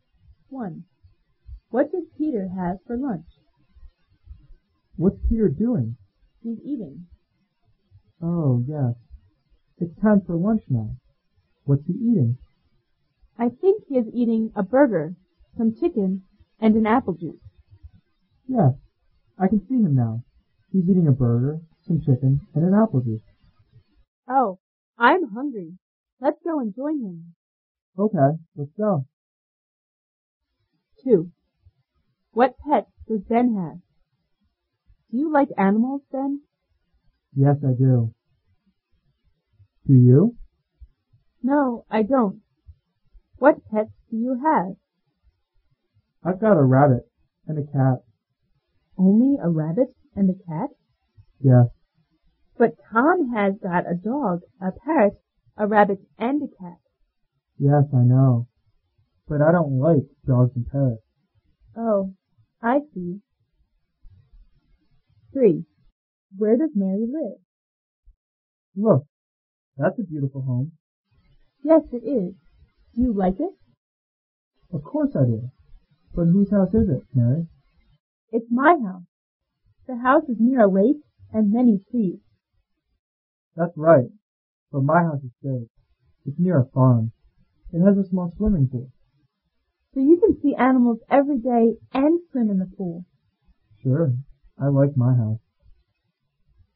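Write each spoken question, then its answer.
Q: What does Peter have for lunch?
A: A burger, some chicken and an apple juice.

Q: What pets does Ben have?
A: A rabbit and a cat.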